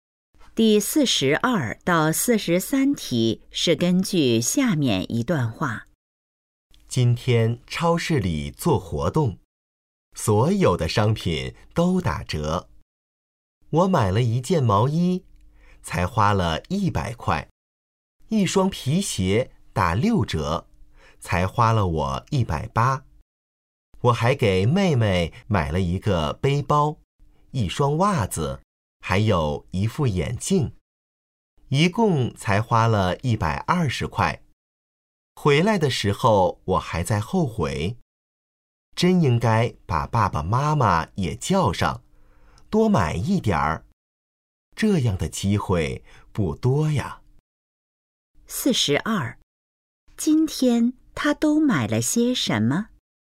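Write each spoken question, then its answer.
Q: 今天他都买了些什么?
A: 毛衣、皮鞋、背包、袜子和眼镜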